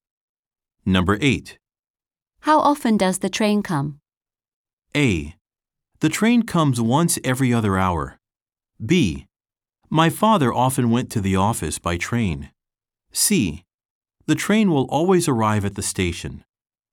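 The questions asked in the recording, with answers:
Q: How often does the train come?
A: A: The train comes once every other hour.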